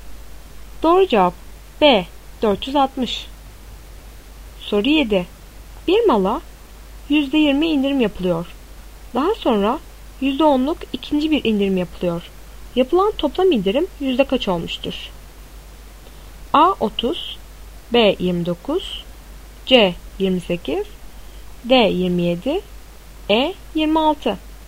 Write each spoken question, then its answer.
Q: Yapılan toplam indirim yüzde kaç olmuştur?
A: Doğru cevap C 28.